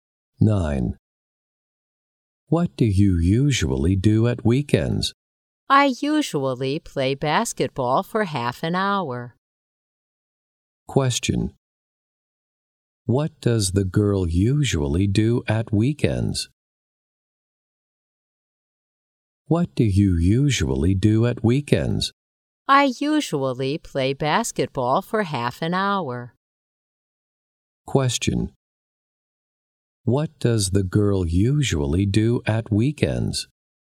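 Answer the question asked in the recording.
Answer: She plays basketball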